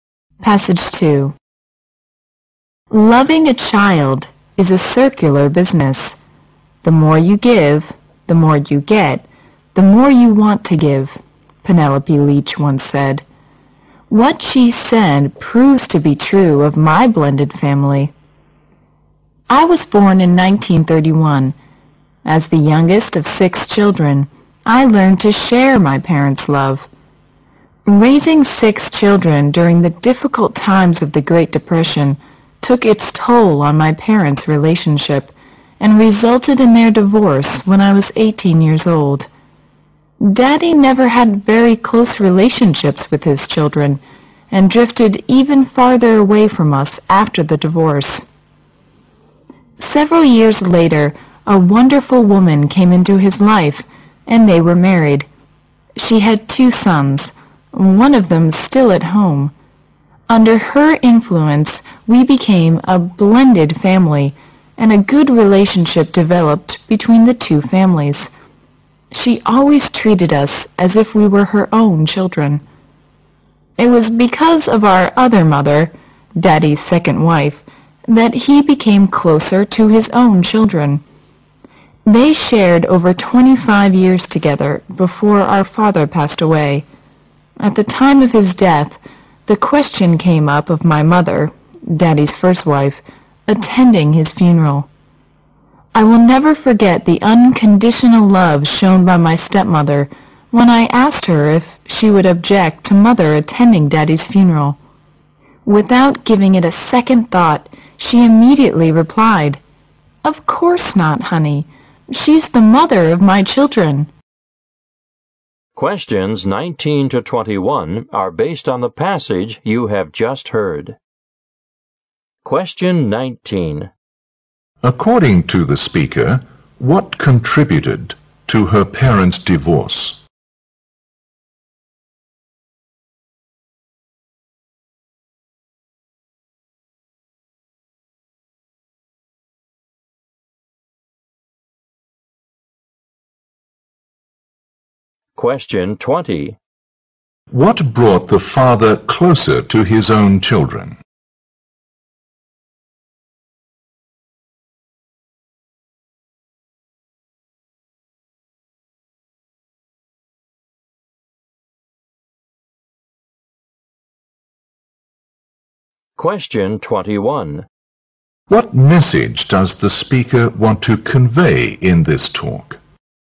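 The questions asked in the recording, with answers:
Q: what contributed to her parents' divorce?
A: The difficulty of raising six children in the Great Depression

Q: What brought the father closer to his own children?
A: His second wife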